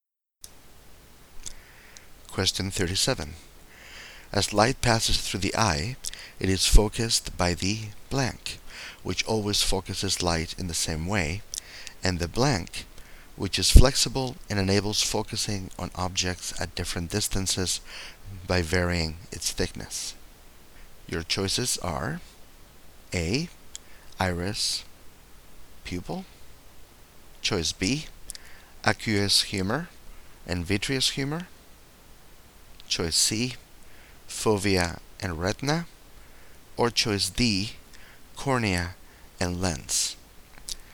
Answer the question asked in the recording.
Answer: So D is the correct choice for 37.